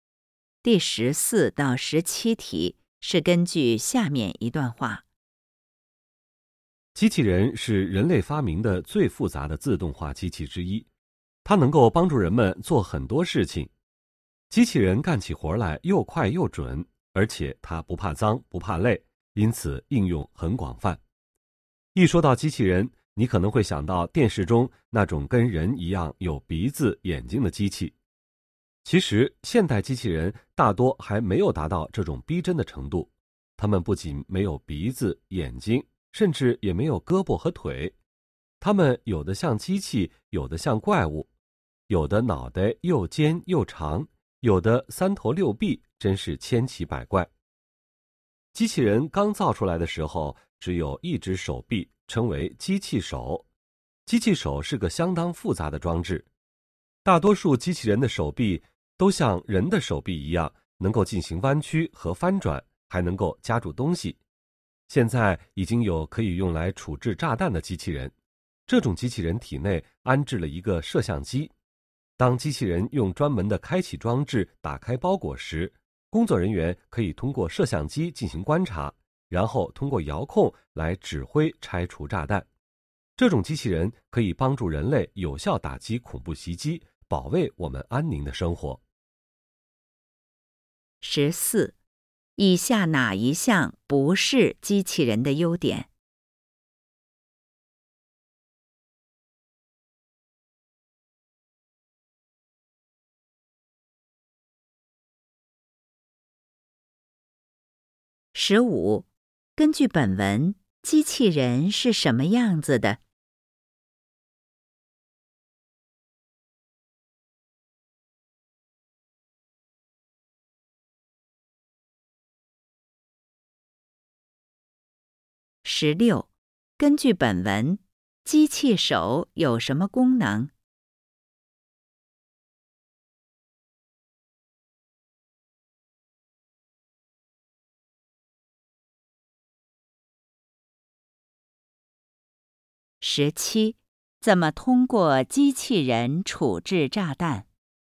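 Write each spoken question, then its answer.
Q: 根据本文,机器人是什么样子的?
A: 千奇百怪,大多没有鼻子眼睛,甚至没有胳膊和腿

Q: 根据本文,机器手有什么功能?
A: 能够弯曲和翻转,还能夹住东西

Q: 怎么通过机器人处置炸弹?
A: 工作人员通过机器人体内的摄像机观察,再遥控指挥拆除炸弹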